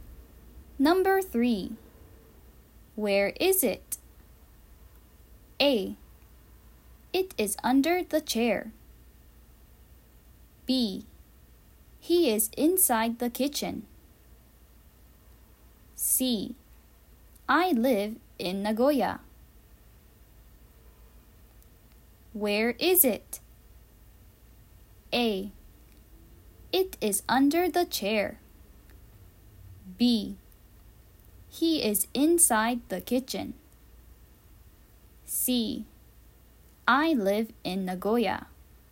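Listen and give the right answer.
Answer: A: It is under the chair.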